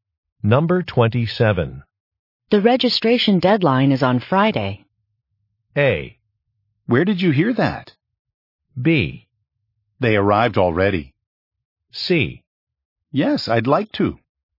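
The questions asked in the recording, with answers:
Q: The registration deadline is on Friday.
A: A: Where did you hear that?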